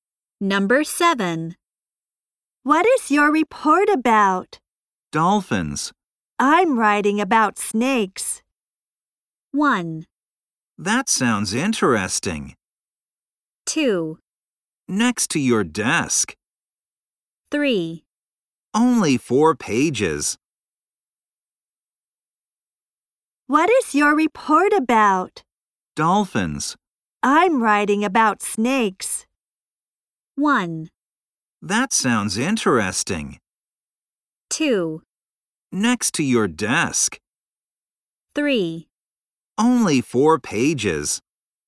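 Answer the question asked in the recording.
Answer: 1: That sounds interesting.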